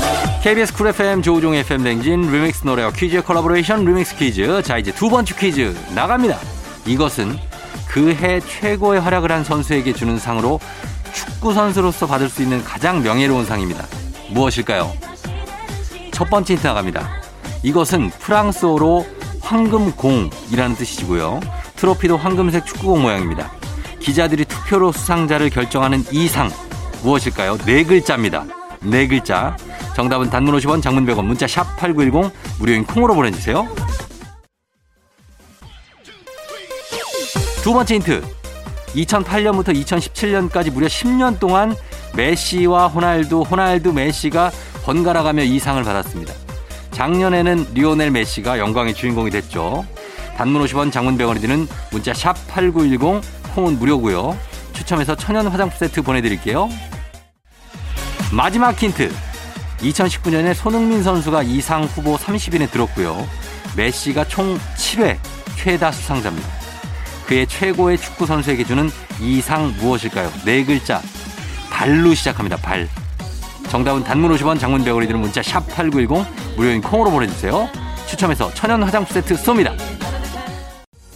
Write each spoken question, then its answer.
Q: 메시가 총 7회 최다 수상자입니다. 그의 최고의 축구 선수에게 주는 이상 무엇일까요?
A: 발롱도르입니다.